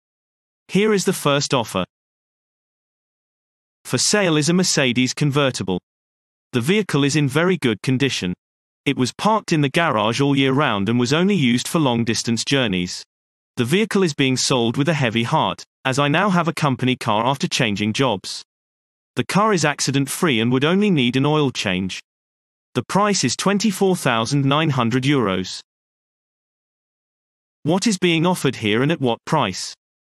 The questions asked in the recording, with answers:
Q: What is being offered here and at what price?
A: Answer. A car is being sold at a price of €24,900.